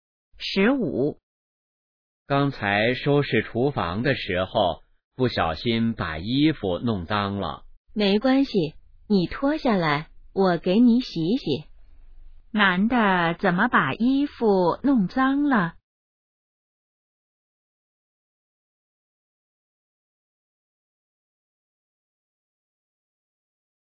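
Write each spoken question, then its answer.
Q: 男的怎么把衣服弄脏了?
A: 收拾厨房时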